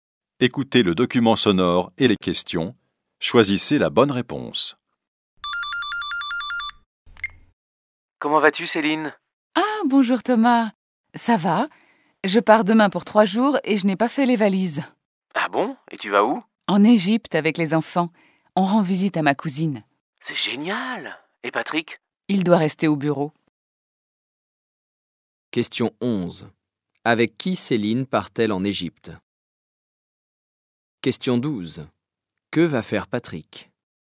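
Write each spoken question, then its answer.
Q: Avec qui Céline part-elle en Égypte ?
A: Avec ses enfants

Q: Que va faire Patrick ?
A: Il doit rester au bureau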